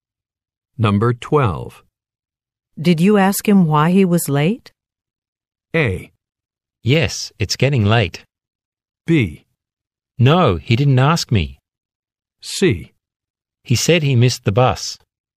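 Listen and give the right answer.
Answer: C: He said he missed the bus.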